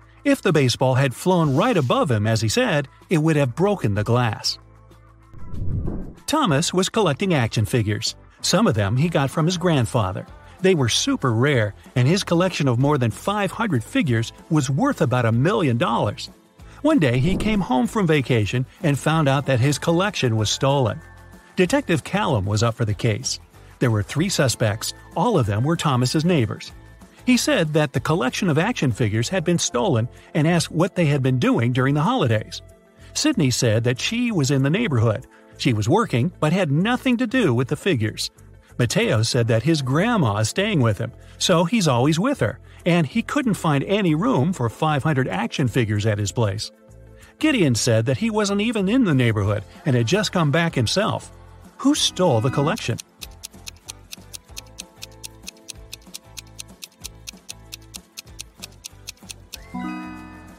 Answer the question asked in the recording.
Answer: Mateo.